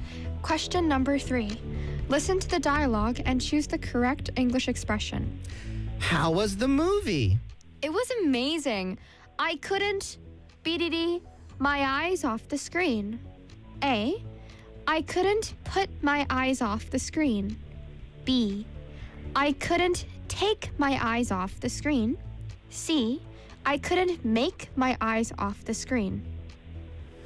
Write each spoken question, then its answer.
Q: Listen to the dialogue and choose the correct English expression.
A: 정답 B입니다.